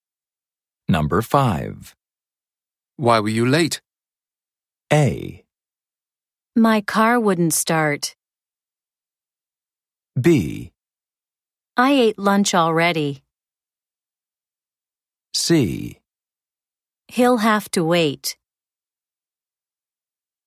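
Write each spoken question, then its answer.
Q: Why were you late?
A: A: My car wouldn't start.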